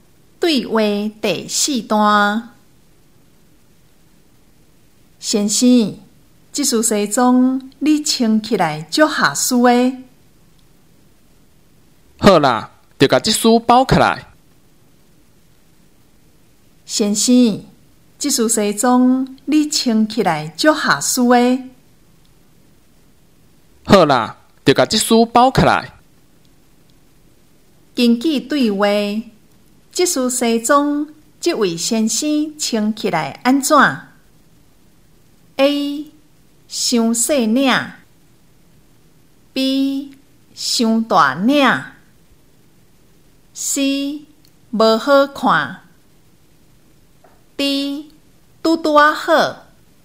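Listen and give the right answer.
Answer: D: 拄拄啊好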